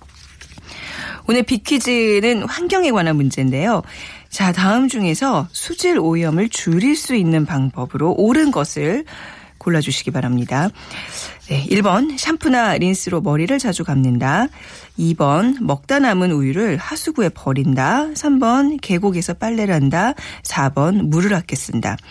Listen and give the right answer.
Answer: 네, 오늘 비키즈 정답 물을 아껴 쓰는 것이 정답 4번이었습니다.